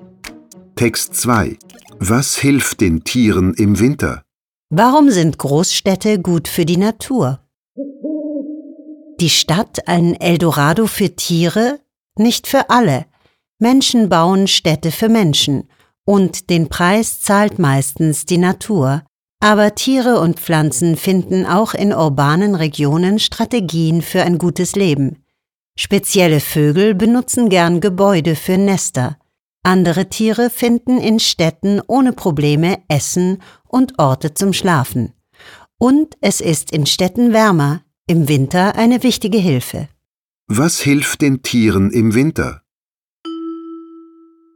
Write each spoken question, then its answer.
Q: Was hilft den Tieren im Winter?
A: In den Städten ist es wärmer.